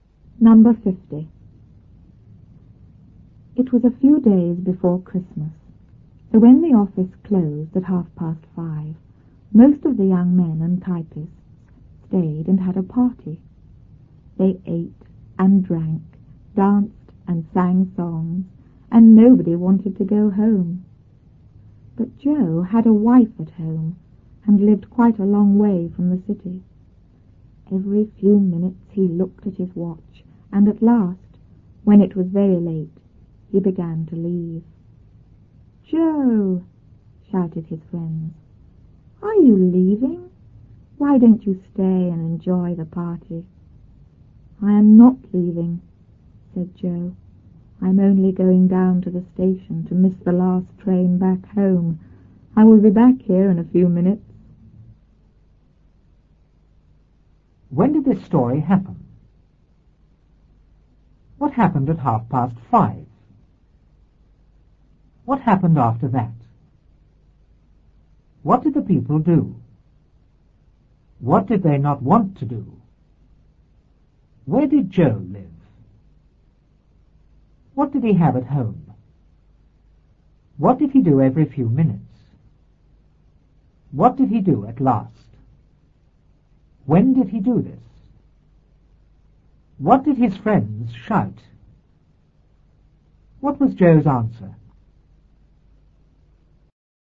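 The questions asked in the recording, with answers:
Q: When did this story happen?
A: A few days before Christmas

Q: What happened at 5:30?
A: The office closed

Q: What happened after that?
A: Most of the young men and typists stayed and had a party

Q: What did the people do?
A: They ate and drank, danced and sang songs

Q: What did they not want to do?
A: Go home

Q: Where did Joe live?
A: Quite a long way from the city

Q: What did he have at home?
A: A wife

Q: What did he do every few minutes?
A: He looked at his watch

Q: What did he do at last?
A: He began to leave

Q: When did he do this?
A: When it was very late

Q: What did his friends shout?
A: "Joe, are you leaving? Why don't you stay and enjoy the party?"

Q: What was Joe's answer?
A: He wasn't leaving; he was only going to the station to miss the last train home and would be back in a few minutes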